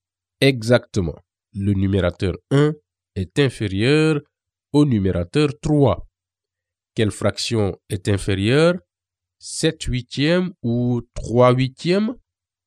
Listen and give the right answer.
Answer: 3 huitièmes est inférieur à 7 huitièmes.